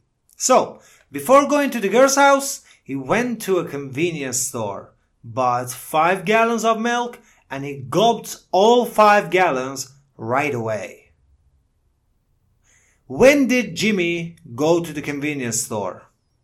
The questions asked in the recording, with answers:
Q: When did Jimmy go to the convenience store?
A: Yes, before going to the girl's house.